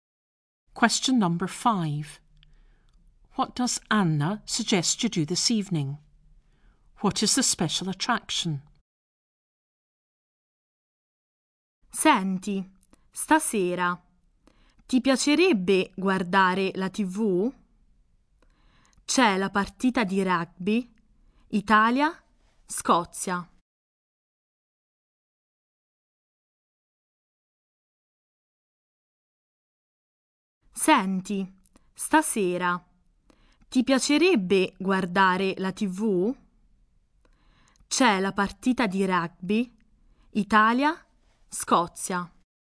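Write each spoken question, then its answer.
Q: What does Anna suggest you do this evening?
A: Watch TV

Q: What is the special attraction?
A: The Italy–Scotland rugby match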